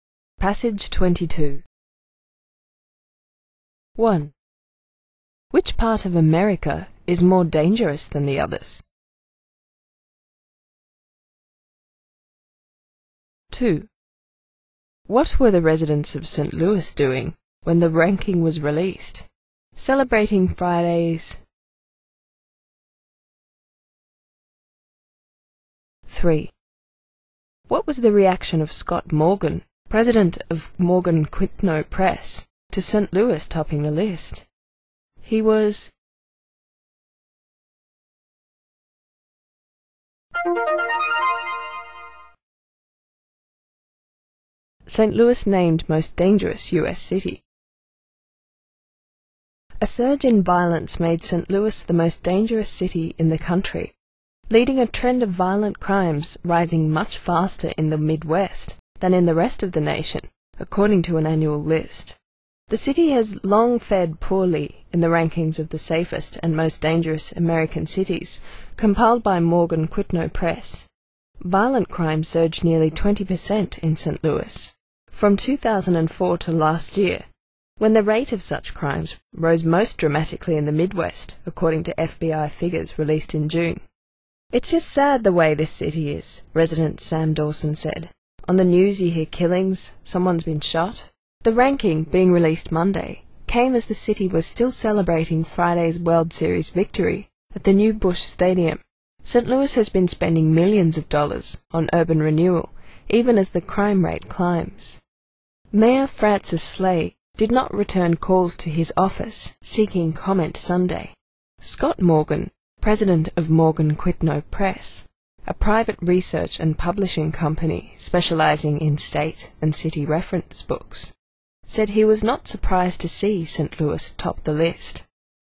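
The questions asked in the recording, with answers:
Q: Which part of America is more dangerous than the others?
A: The Midwest

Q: What were the residents of St. Louis doing when the ranking was released?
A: Celebrating Friday's World Series victory

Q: What was the reaction of Scott Morgan?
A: He was not surprised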